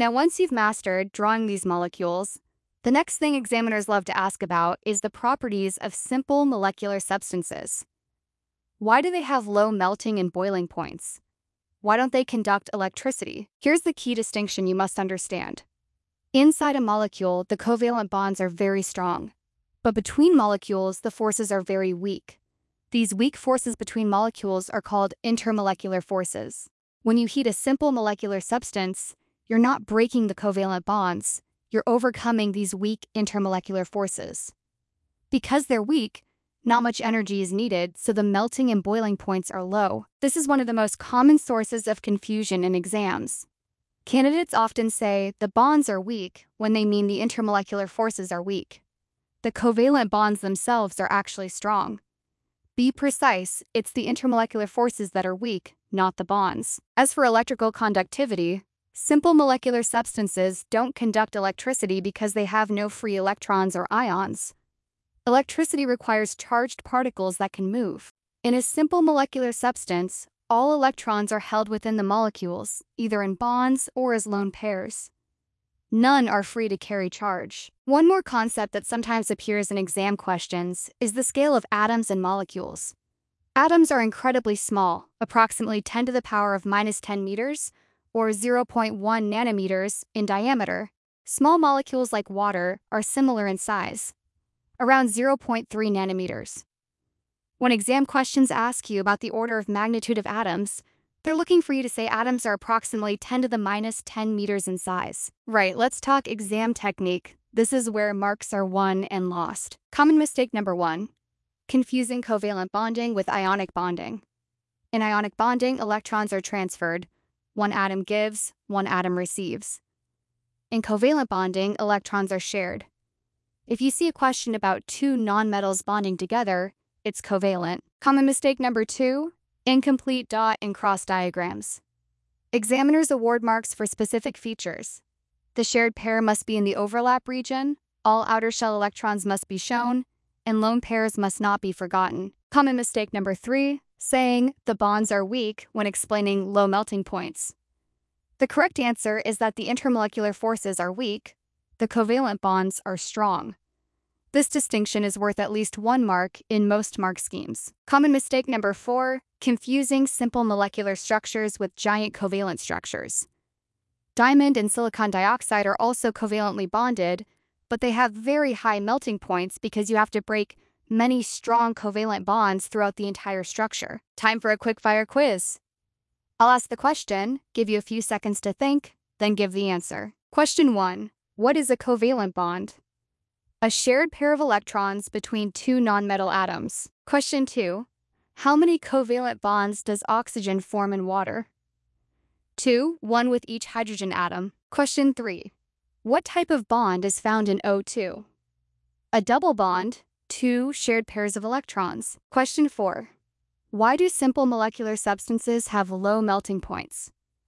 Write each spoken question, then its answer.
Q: Question four, why do simple molecular substances have low melting points?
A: Because the intermolecular forces between molecules are weak, so little energy is needed to overcome them.